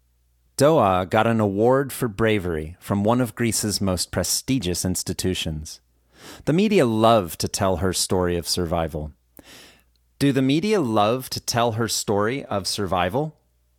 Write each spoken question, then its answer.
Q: Do the media love to tell her story of survival?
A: Yes, the media love to tell her story of survival